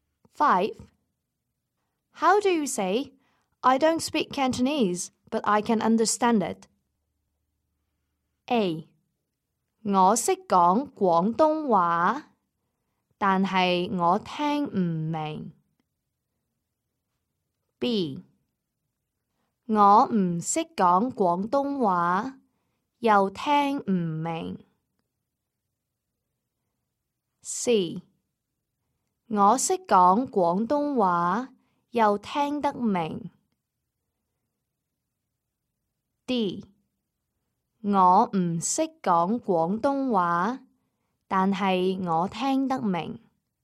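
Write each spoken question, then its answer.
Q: How do you say, I don't speak Cantonese, but I can understand it?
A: D: 我唔識講廣東話,但係我聽得明。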